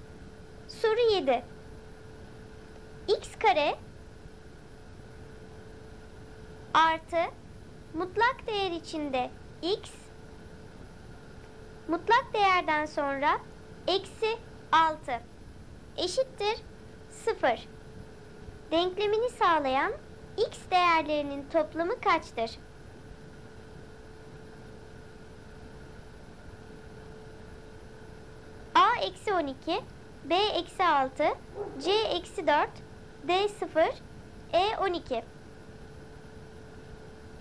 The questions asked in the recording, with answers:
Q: Denklemini sağlayan X değerlerinin toplamı kaçtır?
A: Doğru cevap D-0.